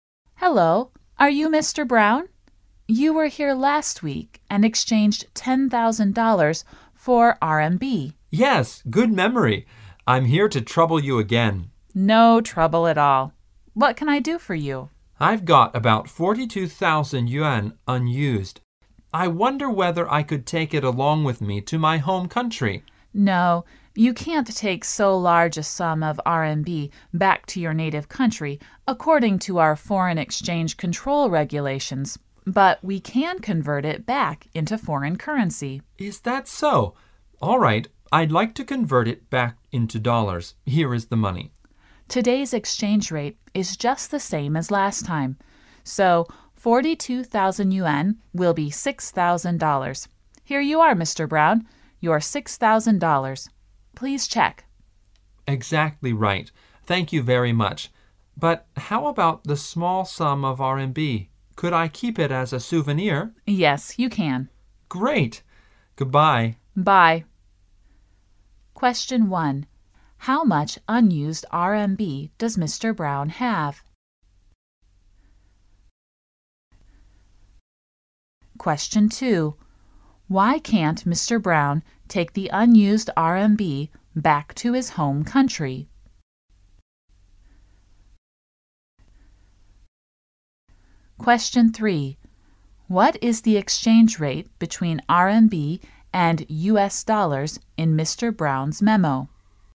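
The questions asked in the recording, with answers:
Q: How much unused RMB does Mr. Brown have?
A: About 42,000 yuan

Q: Why can't Mr. Brown take the unused RMB back to his home country?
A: Because of the foreign exchange control regulations

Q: What is the exchange rate between RMB and US dollars in Mr. Brown's memo?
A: 7 yuan to 1 dollar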